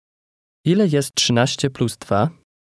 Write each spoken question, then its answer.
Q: Ile jest 13 plus 2?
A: 15.